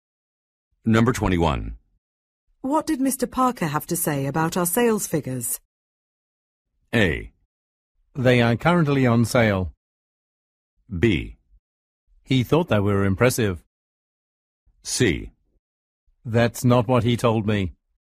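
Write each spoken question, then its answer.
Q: What did Mr. Parker have to say about our sales figures?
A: B: He thought they were impressive.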